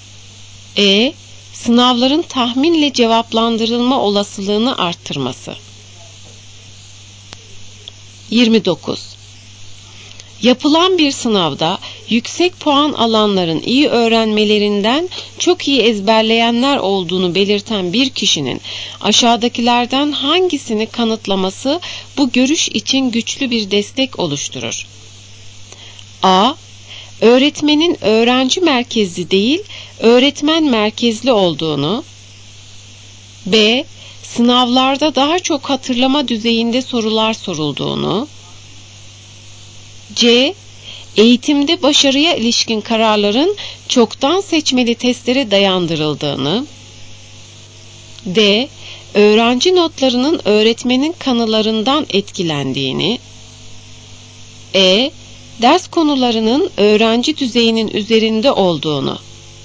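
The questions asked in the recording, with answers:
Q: Yapılan bir sınavda yüksek puan alanların iyi öğrenmelerinden çok iyi ezberleyenler olduğunu belirten bir kişinin aşağıdakilerden hangisini kanıtlaması bu görüş için güçlü bir destek oluşturur?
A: B: Sınavlarda daha çok hatırlama düzeyinde sorular sorulduğunu.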